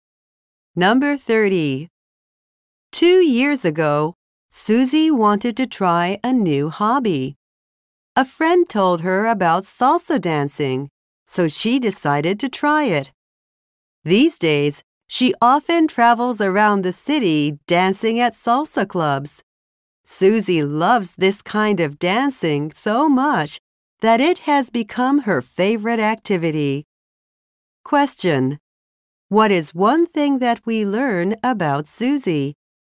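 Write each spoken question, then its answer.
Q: What is one thing that we learn about Susie?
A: Salsa dancing has become her favorite activity.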